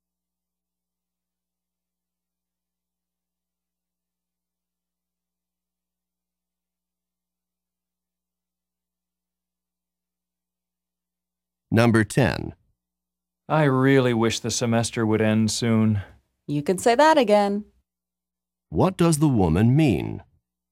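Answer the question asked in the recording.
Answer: She agrees; she also wants the semester to end soon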